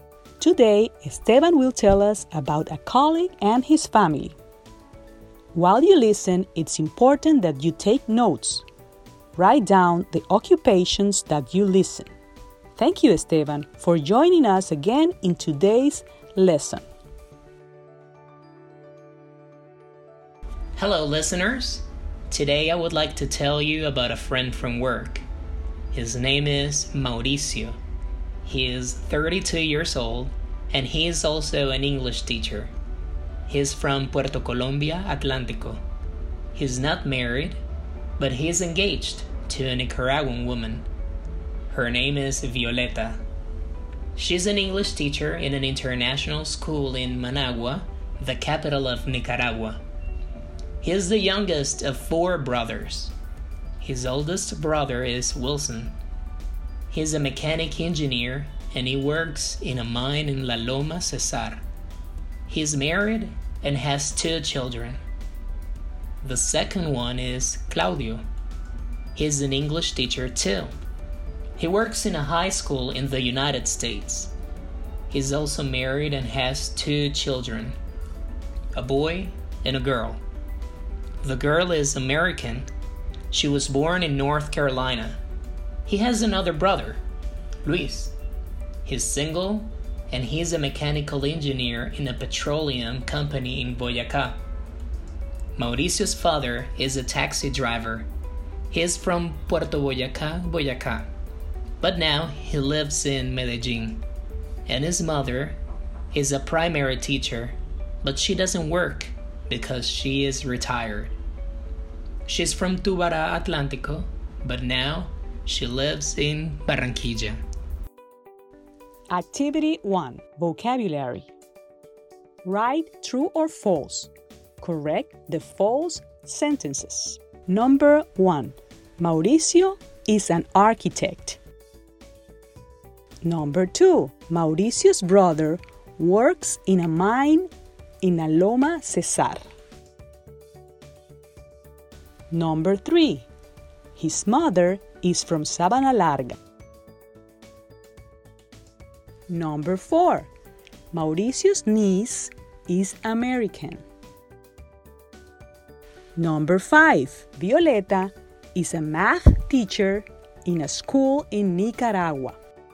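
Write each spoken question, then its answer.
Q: Mauricio is an architect.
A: False: he is an English teacher

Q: Mauricio's brother works in a mine in La Loma Cesar.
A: True

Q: His mother is from Sabana Larga.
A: False: she is from Tubará, Atlántico

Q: Mauricio's niece is American.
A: True

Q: Violeta is a math teacher in a school in Nicaragua.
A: False: she is an English teacher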